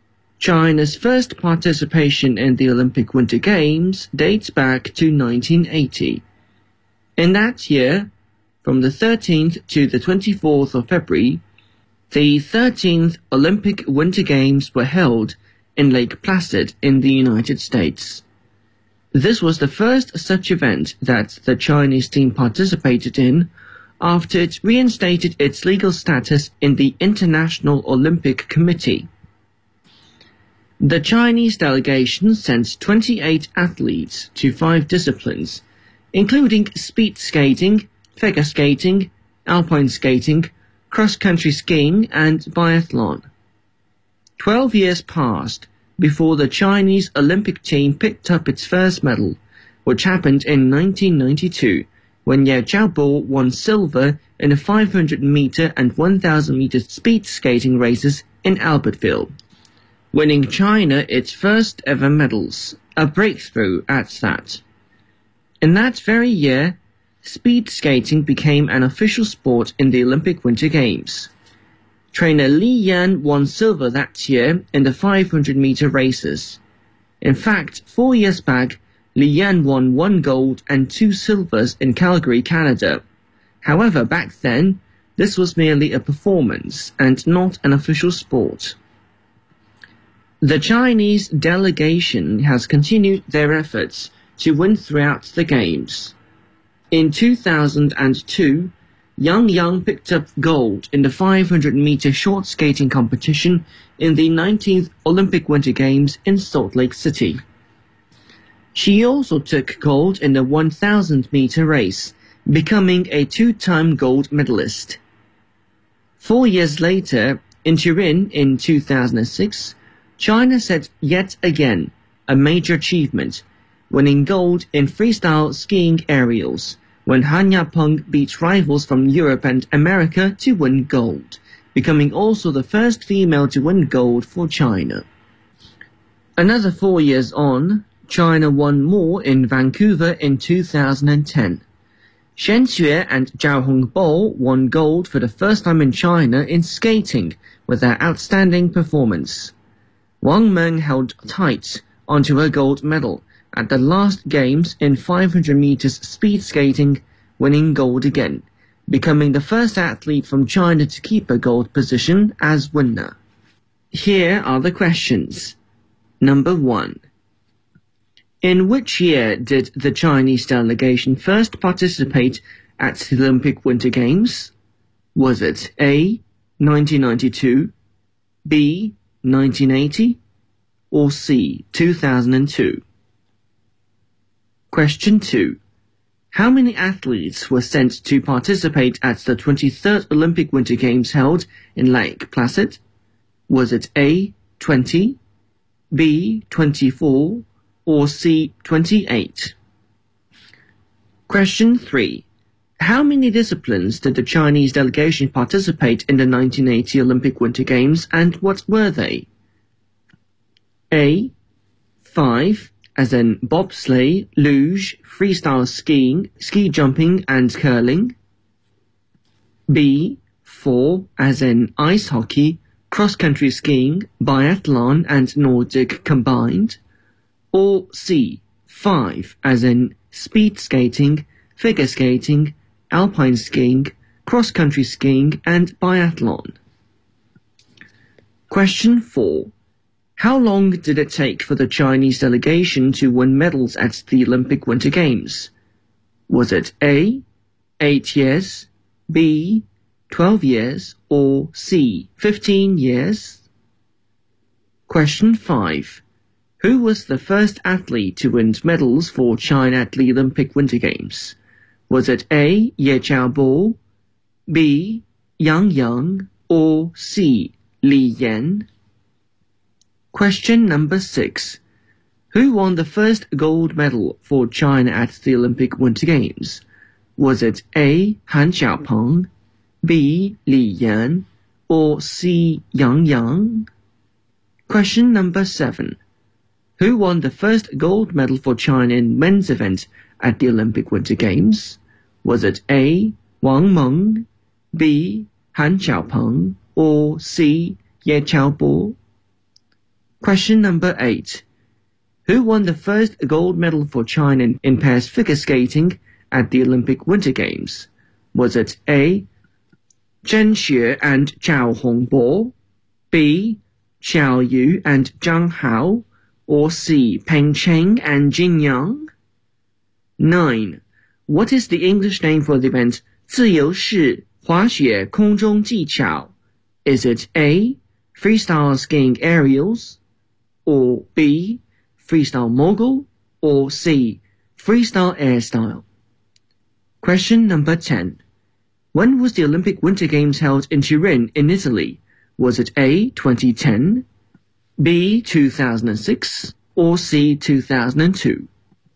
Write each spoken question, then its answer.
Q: In which year did the Chinese delegation first participate at the Olympic Winter Games?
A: Question 1, B.

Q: How many athletes were sent to participate at the 23rd Olympic Winter Games held in Lake Placid?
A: Question 2, C.

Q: How many disciplines did the Chinese delegation participate in the 1980 Olympic Winter Games and what were they?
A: Question 3, C.

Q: How long did it take for the Chinese delegation to win medals at the Olympic Winter Games?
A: Question 4, B.

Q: Who was the first athlete to win medals for China at the Olympic Winter Games?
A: Question 5, A.

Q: Who won the first gold medal for China at the Olympic Winter Games?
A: Question 6, C.

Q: Who won the first gold medal for China in men's event at the Olympic Winter Games?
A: Question 7, B.

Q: Who won the first gold medal for China in pairs figure skating at the Olympic Winter Games?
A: Question 8, A.

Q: What is the English name for the event 自由式 滑雪 空中技巧?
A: Question 9, A.

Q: When was the Olympic Winter Games held in Turin in Italy?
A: Question 10, B.